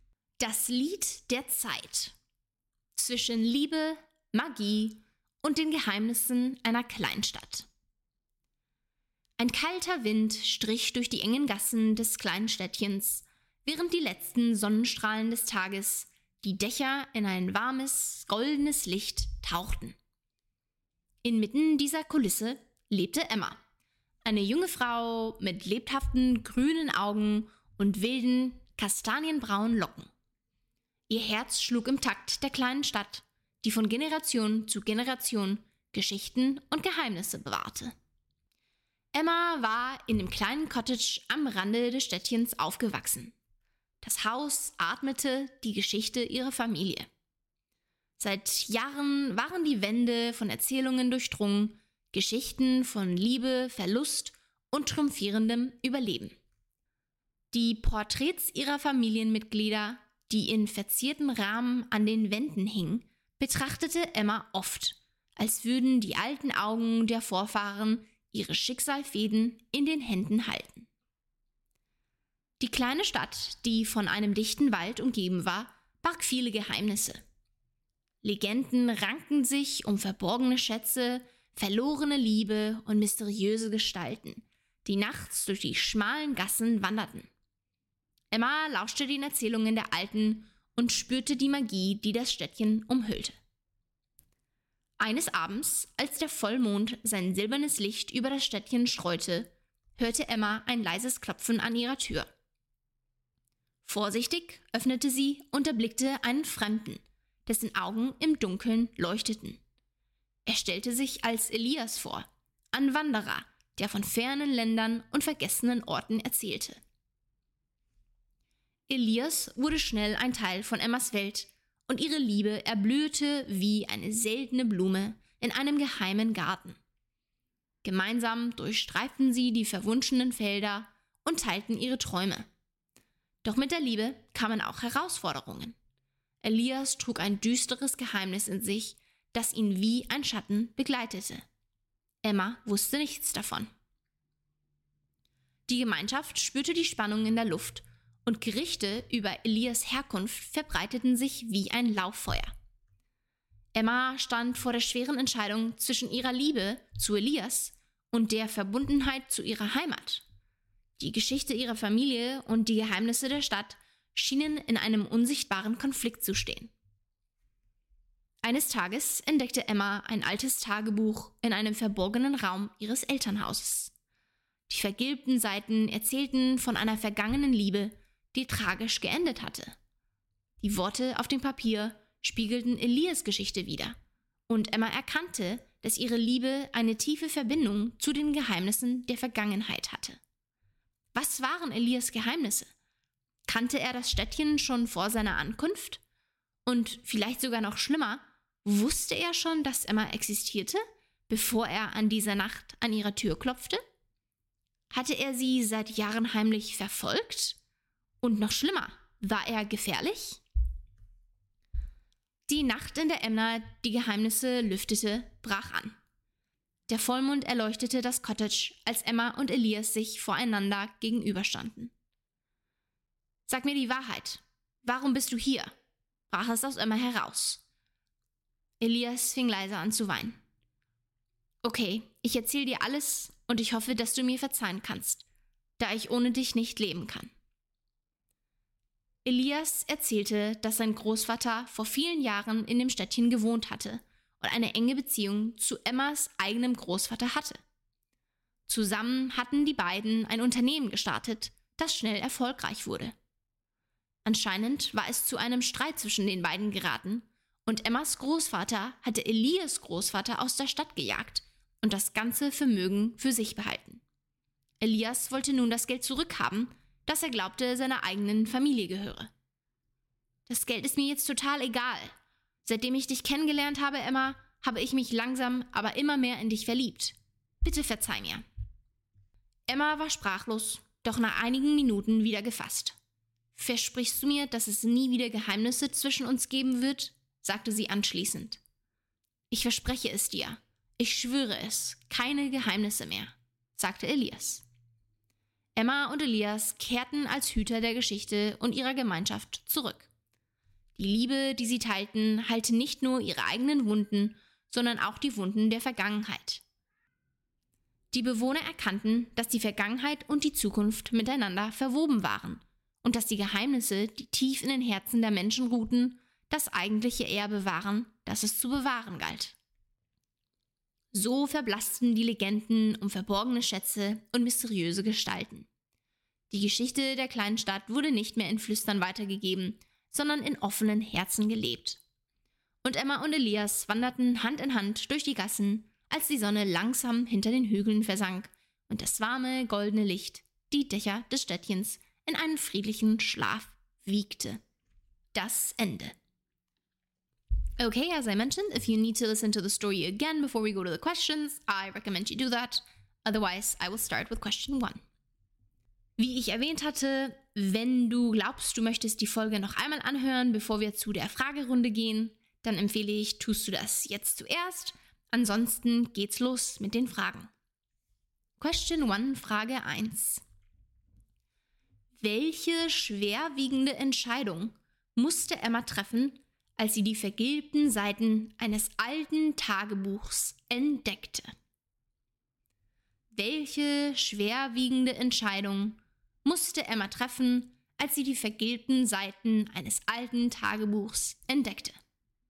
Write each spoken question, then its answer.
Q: Welche schwerwiegende Entscheidung musste Emma treffen, als sie die vergilbten Seiten eines alten Tagebuchs entdeckte?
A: Als Emma die vergilbten Seiten des alten Tagebuchs fand, musste sie eine schwierige Entscheidung zwischen ihrer Liebe zu Elias und ihrer Verpflichtung gegenüber ihrer Heimat treffen.